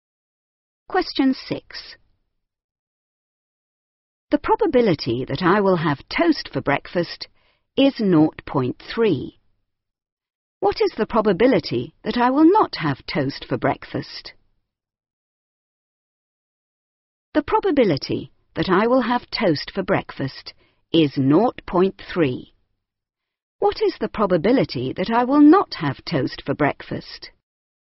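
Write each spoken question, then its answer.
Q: What is the probability that I will not have toast for breakfast?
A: 0.7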